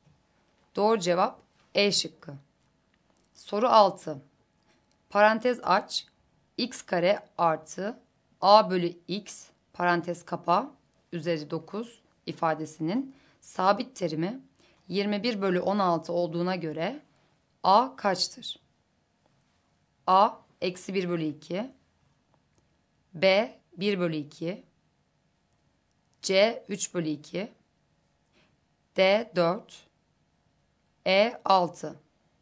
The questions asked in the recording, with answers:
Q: Parantez aç, x kare artı A bölü x parantez kapa üzeri 9 ifadesinin sabit terimi 21 bölü 16 olduğuna göre A kaçtır?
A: Doğru cevap B şıkkı.